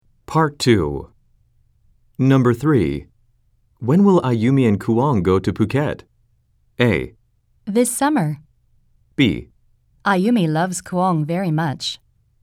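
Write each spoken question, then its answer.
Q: When will Ayumi and Kuang go to Phuket?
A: A: This summer.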